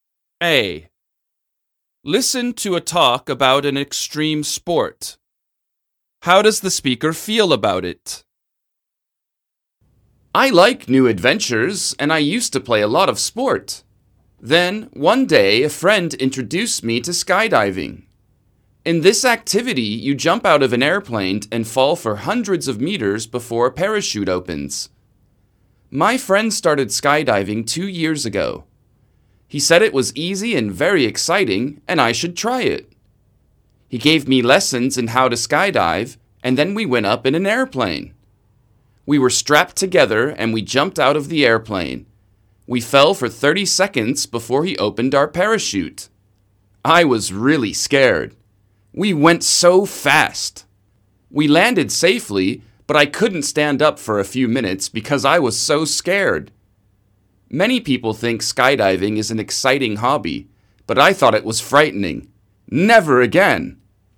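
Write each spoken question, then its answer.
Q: How does the speaker feel about it?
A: He found it frightening and will never do it again.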